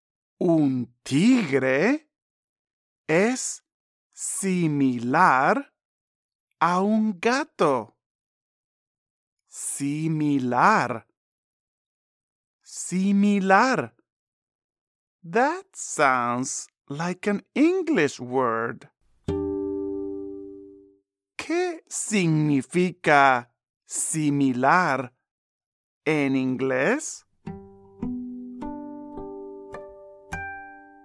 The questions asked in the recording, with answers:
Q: ¿Qué significa similar en inglés?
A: Sí, similar.